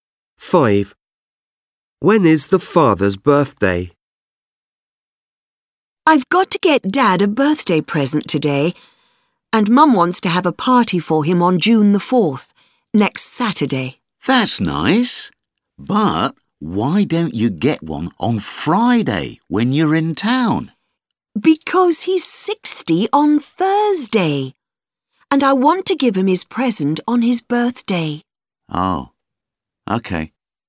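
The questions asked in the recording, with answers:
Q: When is the father's birthday?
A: Thursday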